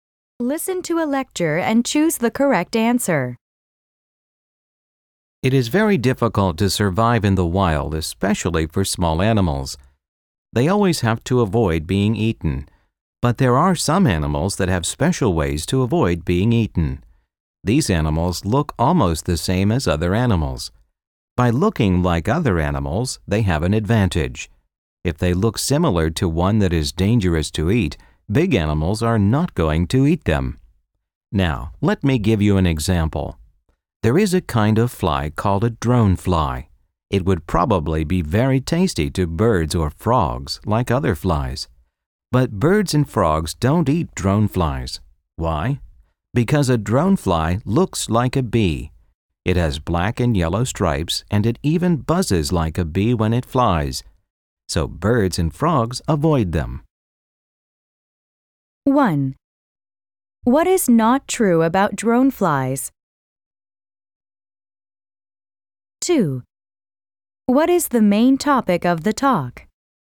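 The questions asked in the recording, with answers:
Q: What is the main topic of the talk?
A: Animals that avoid being eaten by looking like other, dangerous animals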